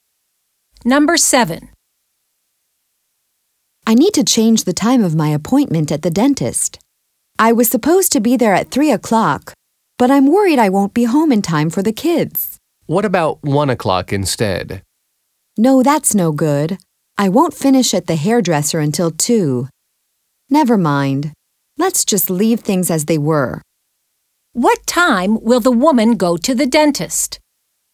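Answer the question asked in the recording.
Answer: At 3 o'clock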